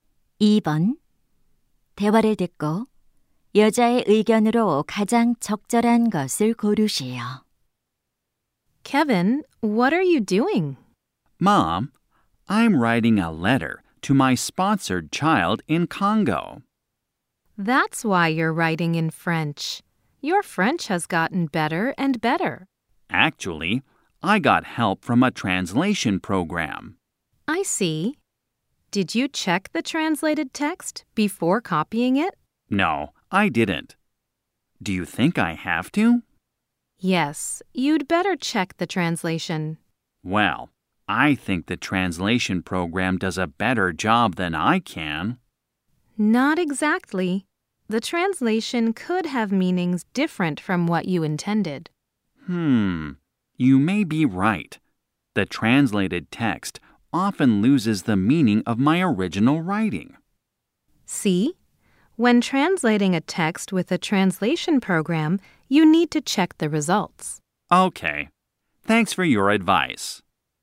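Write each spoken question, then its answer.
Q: 대화를 듣고 여자의 의견으로 가장 적절한 것을 고르시오.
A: 번역 프로그램으로 번역한 결과는 확인해야 한다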